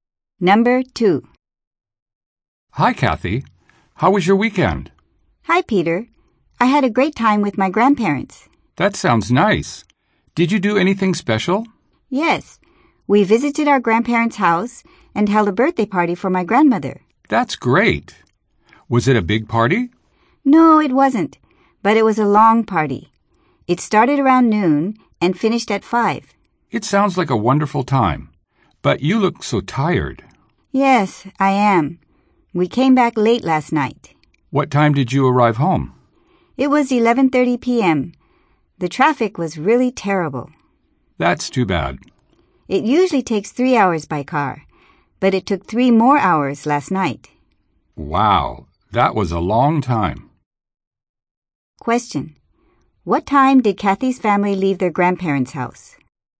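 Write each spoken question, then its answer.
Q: What time did Kathy's family leave their grandparents' house?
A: At 5:30 p.m.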